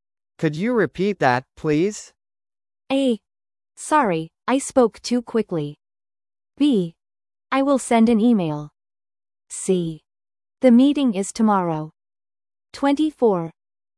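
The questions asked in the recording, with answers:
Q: Could you repeat that, please?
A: A: Sorry, I spoke too quickly.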